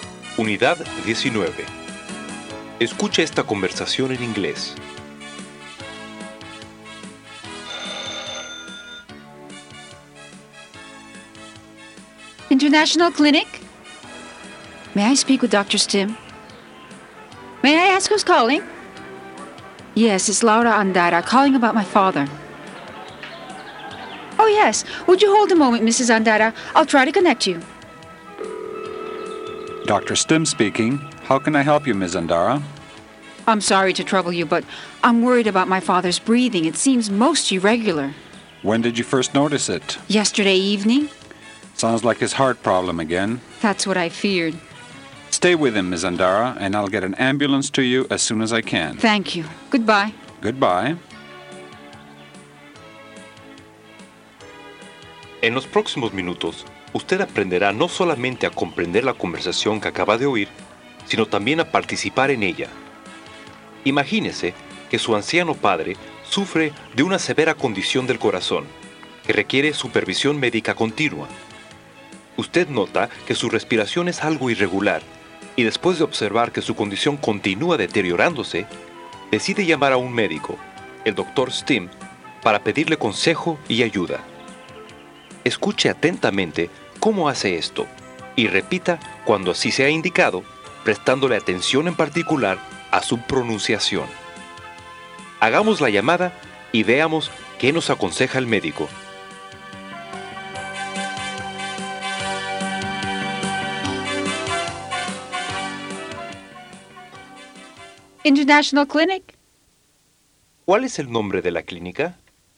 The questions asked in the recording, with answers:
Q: ¿Cuál es el nombre de la clínica?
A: International Clinic.